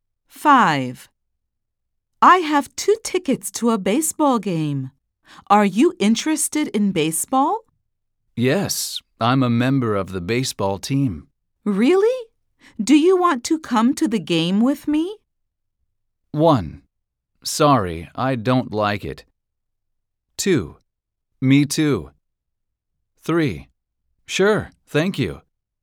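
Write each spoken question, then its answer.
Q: Really? Do you want to come to the game with me?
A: 3: Sure, thank you.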